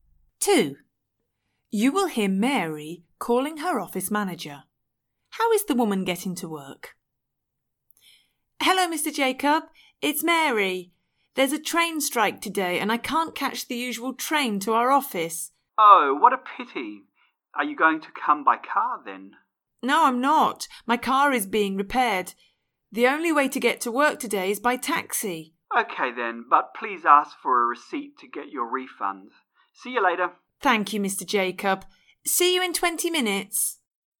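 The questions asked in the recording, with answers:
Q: How is the woman getting to work?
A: By taxi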